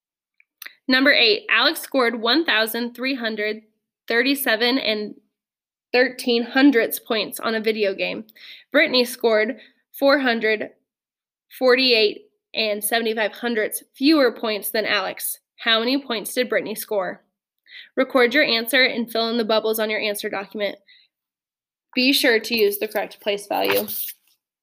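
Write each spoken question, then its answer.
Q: How many points did Brittany score?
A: 888.38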